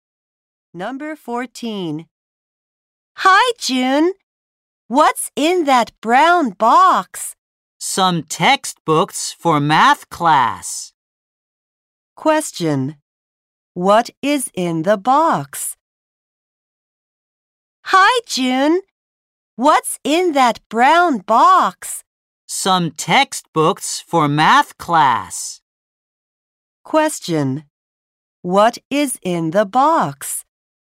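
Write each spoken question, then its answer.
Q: What is in the box?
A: Some textbooks for math class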